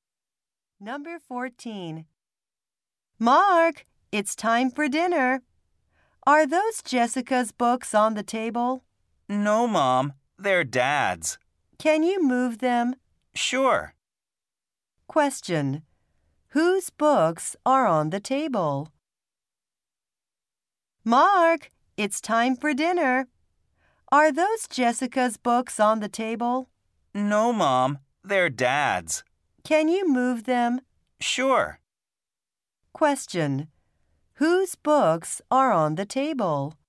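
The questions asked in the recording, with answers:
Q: Whose books are on the table?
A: Dad's.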